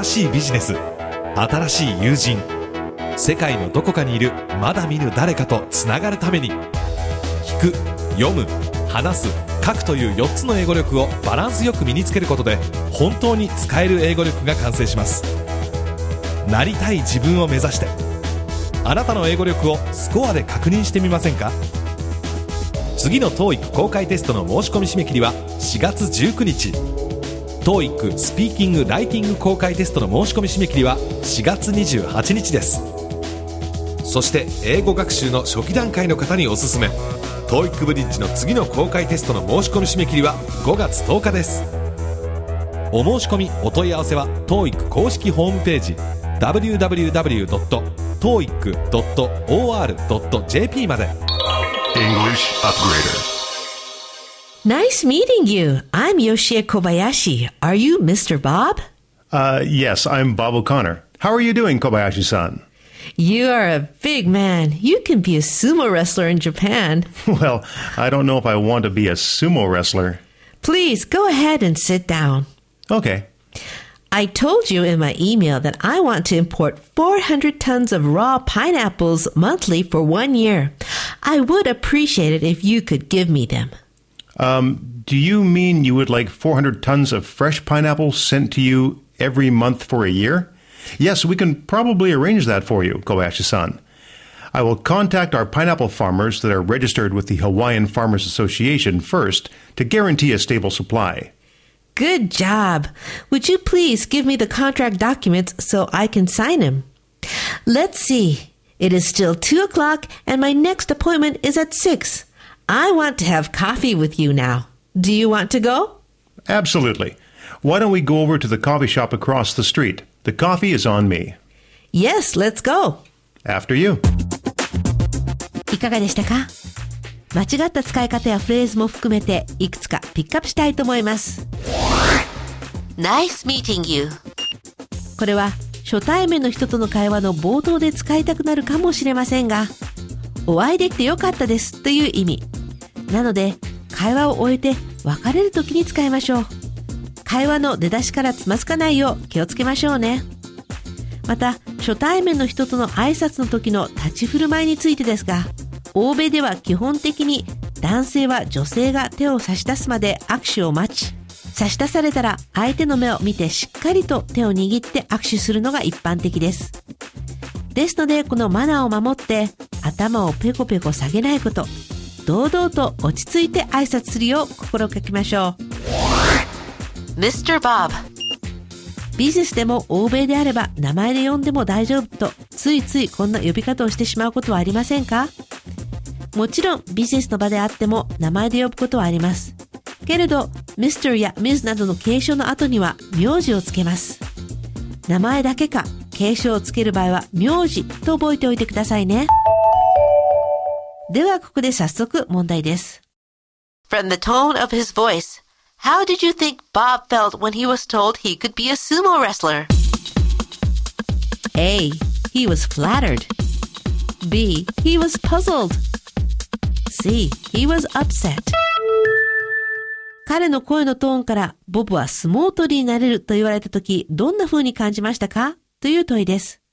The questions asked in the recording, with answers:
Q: From the tone of his voice, How did you think Bob felt when he was told he could be a sumo wrestler?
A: 正解は B。彼は困惑したですね。